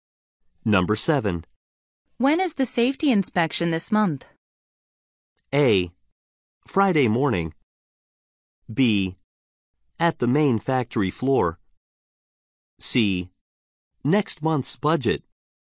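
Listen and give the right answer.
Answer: A: Friday morning.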